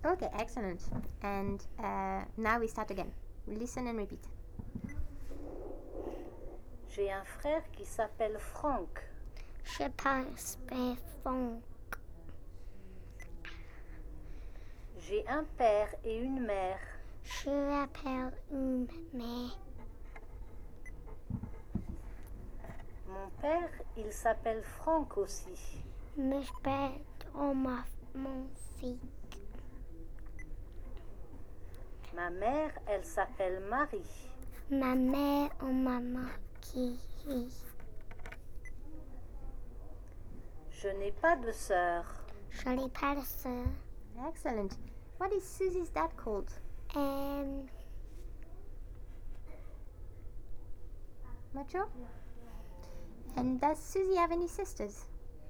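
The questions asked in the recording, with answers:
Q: What is Susie's dad called?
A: Franck

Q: And does Suzy have any sisters?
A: No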